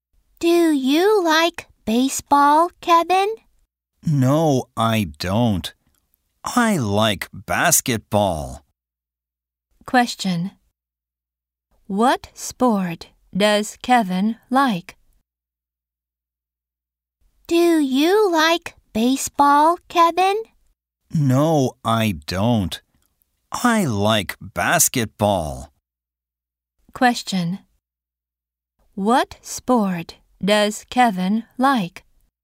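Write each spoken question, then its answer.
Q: What sport does Kevin like?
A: Basketball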